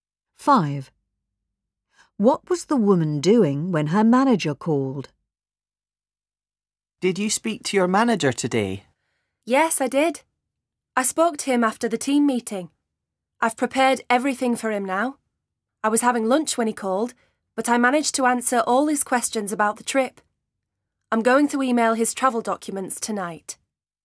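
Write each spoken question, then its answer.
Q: What was the woman doing when her manager called?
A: Having lunch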